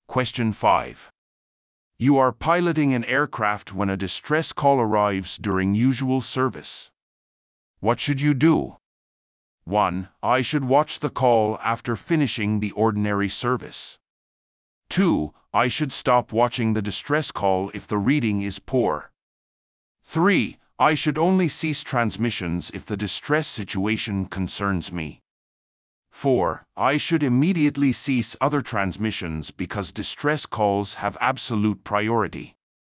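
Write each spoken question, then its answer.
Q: What should you do?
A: 4: I should immediately cease other transmissions because distress calls have absolute priority.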